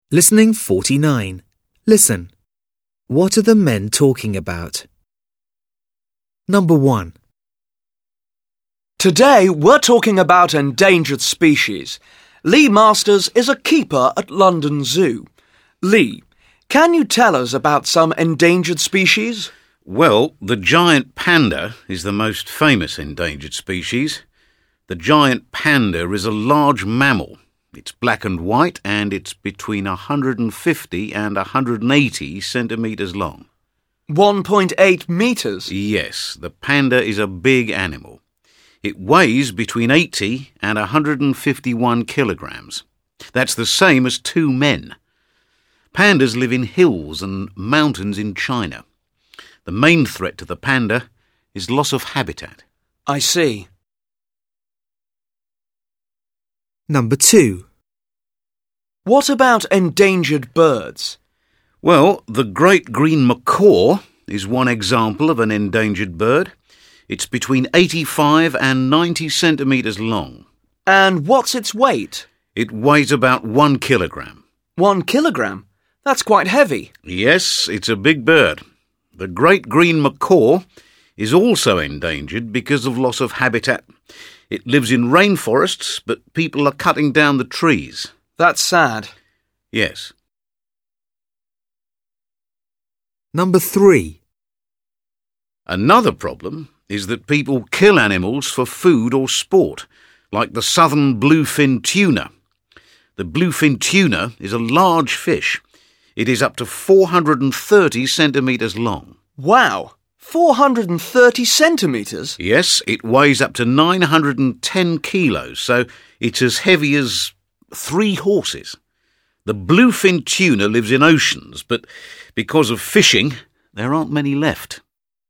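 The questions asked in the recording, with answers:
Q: What are the men talking about?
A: Endangered species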